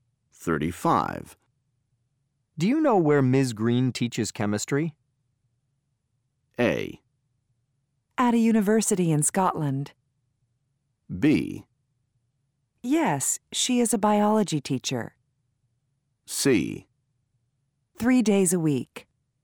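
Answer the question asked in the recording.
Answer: A: At a university in Scotland.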